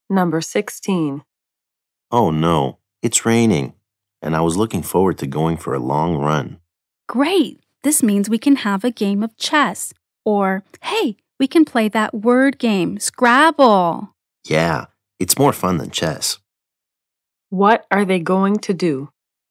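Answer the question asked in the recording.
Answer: Play Scrabble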